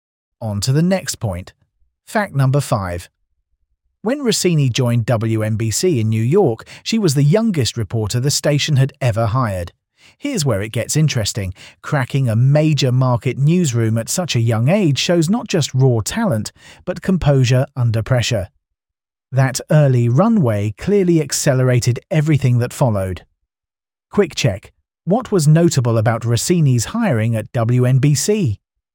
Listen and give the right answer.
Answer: Correct answer. She was the youngest reporter hired.